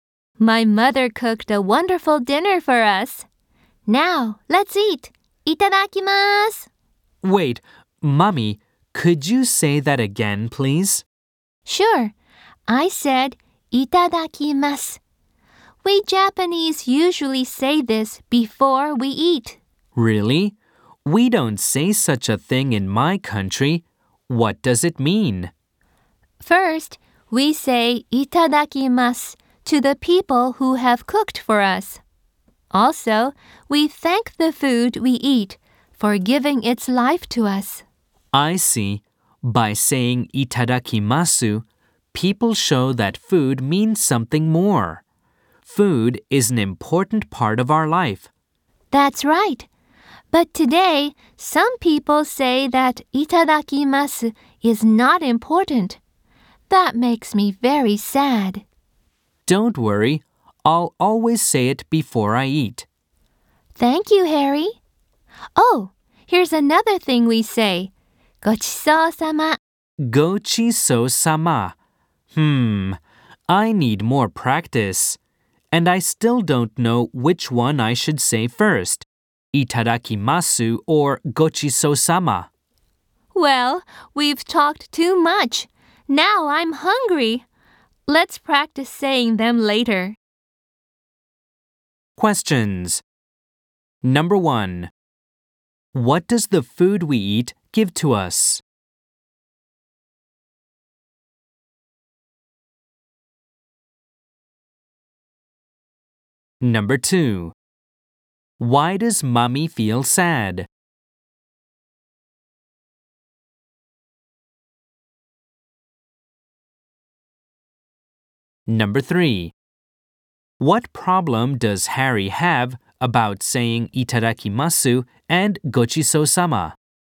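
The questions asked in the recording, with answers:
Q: What does the food we eat give to us?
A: Its life.

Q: Why does Mommy feel sad?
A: Because some people say that itadakimasu is not important.

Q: What problem does Harry have about saying itadakimasu and gochisousama?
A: He doesn't know which one he should say first.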